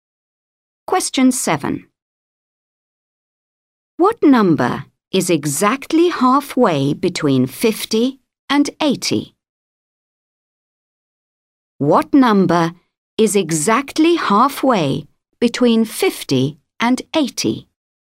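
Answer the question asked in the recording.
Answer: 65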